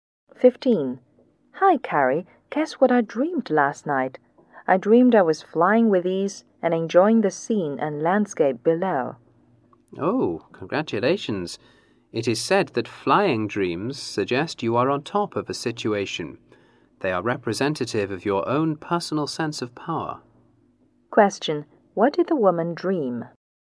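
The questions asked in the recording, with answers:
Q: What did the woman dream?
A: She was flying with ease and enjoying the scenery below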